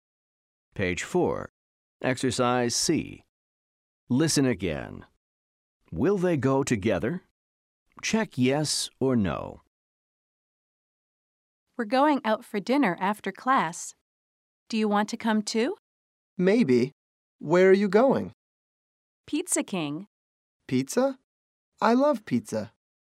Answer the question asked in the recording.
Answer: The answer is yes.